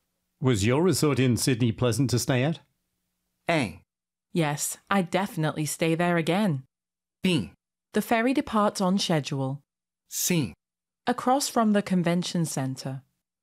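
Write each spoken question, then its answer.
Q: Was your resort in Sydney pleasant to stay at?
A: A: Yes, I'd definitely stay there again.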